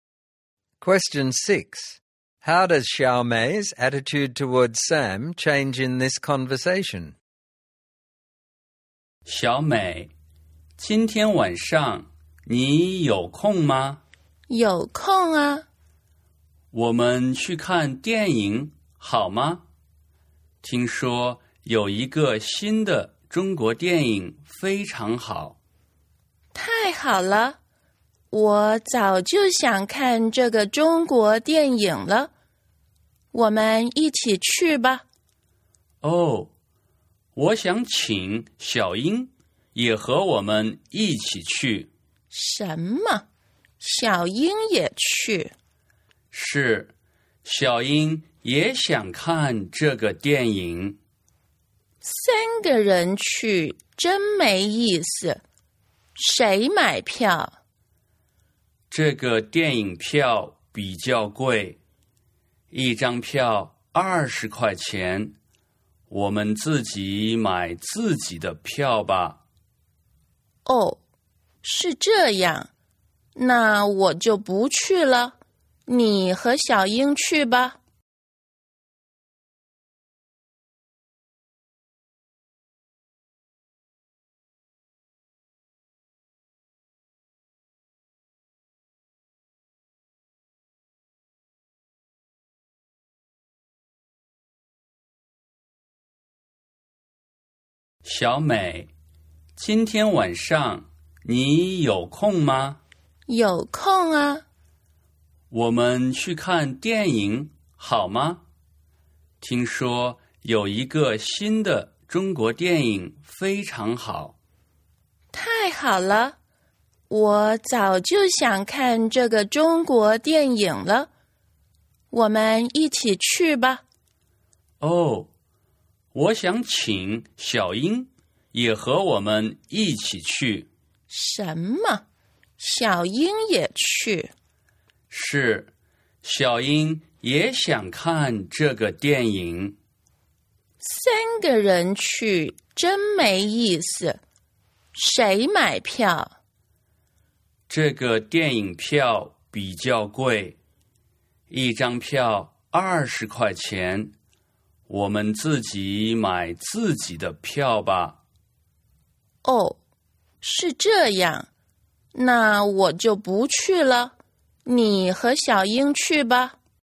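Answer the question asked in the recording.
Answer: She starts out happy to go to the film with him, then becomes unhappy and refuses to go when Xiaoying is invited and they must buy their own tickets.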